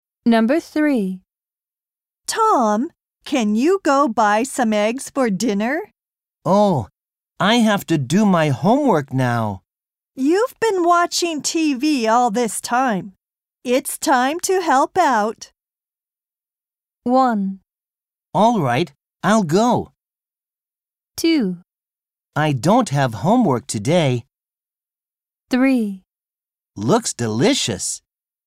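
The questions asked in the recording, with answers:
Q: It's time to help out.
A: 1: All right, I'll go.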